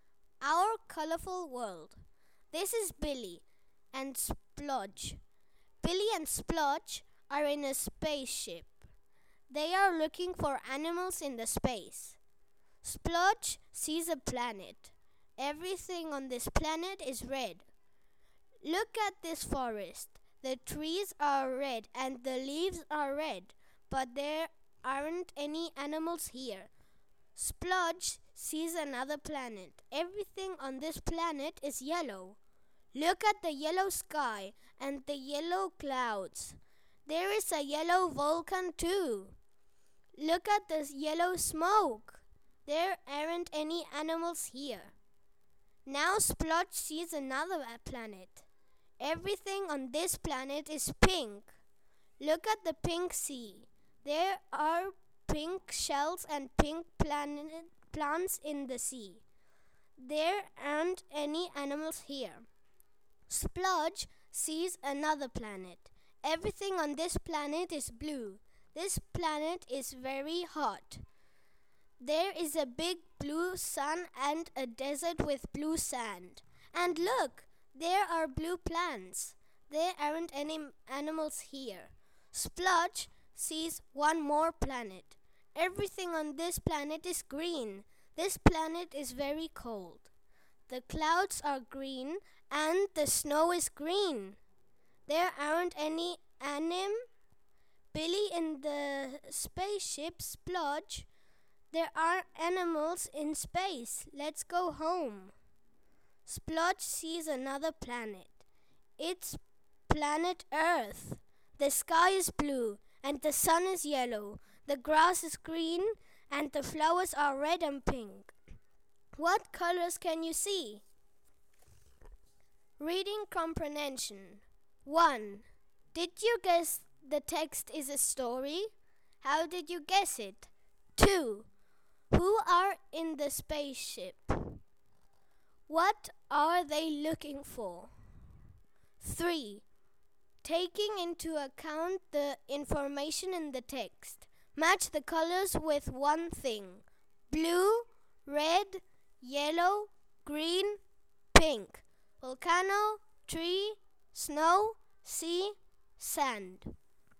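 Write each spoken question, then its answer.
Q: Who are in the spaceship?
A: Billy and Splodge

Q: What are they looking for?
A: Animals

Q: Match the colors with one thing.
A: Blue: sand, red: tree, yellow: volcano, green: snow, pink: sea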